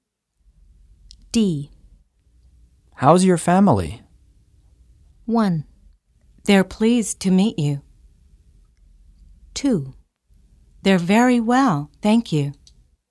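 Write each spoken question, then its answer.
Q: How's your family?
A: 2: They're very well, thank you.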